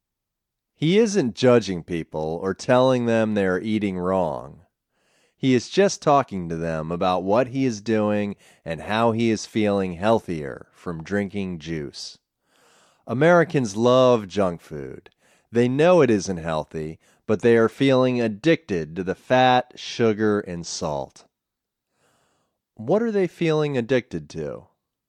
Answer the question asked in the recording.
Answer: They are feeling addicted to the fat, sugar, and salt.